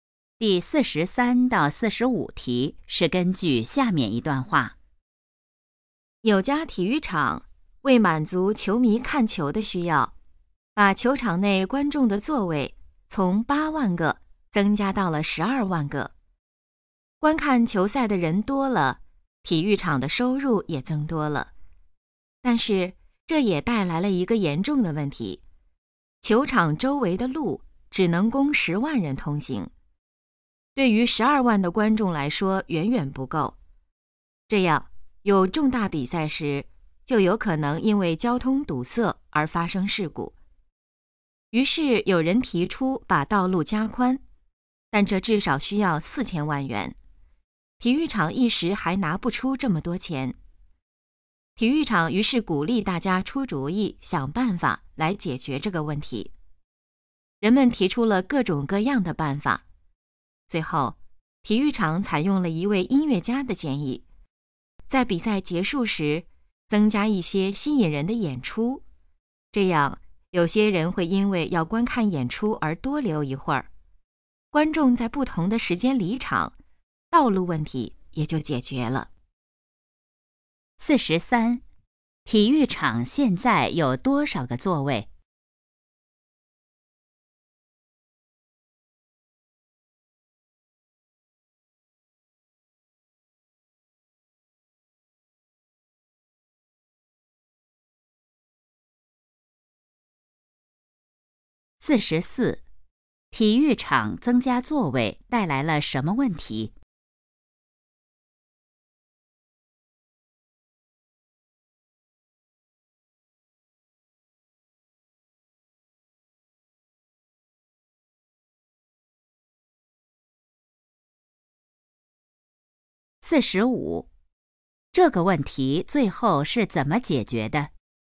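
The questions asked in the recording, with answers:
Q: 体育场现在有多少个座位?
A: 12万个

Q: 体育场增加座位带来了什么问题?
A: 交通问题,周围的路不够通行

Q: 这个问题最后是怎么解决的?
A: 比赛结束时增加演出,让观众在不同时间离场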